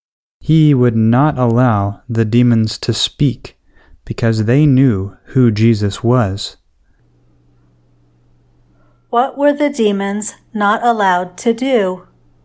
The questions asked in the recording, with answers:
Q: What were the demons not allowed to do?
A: The demons were not allowed to speak.